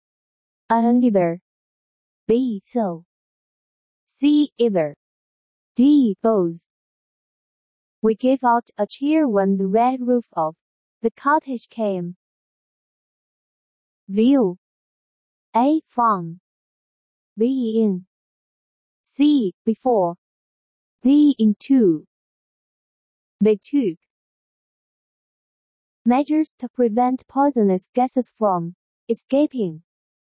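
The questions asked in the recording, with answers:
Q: We gave out a cheer when the red roof of the cottage came.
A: D: Into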